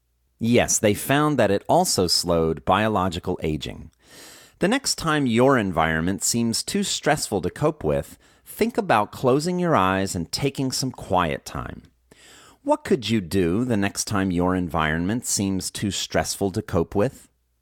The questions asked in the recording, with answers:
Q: What could you do the next time your environment seems too stressful to cope with?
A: The next time your environment seems too stressful to cope with, think about closing your eyes and taking some quiet time.